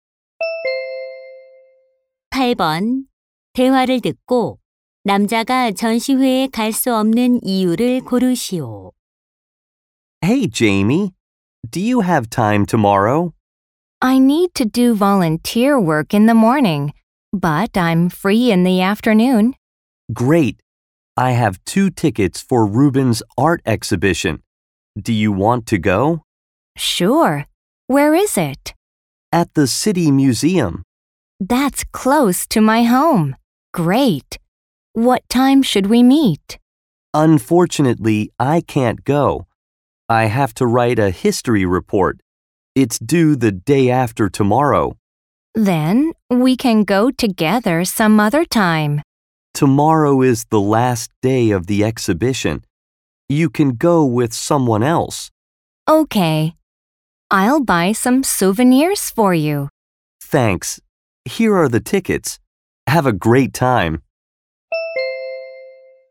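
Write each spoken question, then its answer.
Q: 대화를 듣고 남자가 전시회에 갈 수 없는 이유를 고르시오.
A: 역사 보고서를 써야 해서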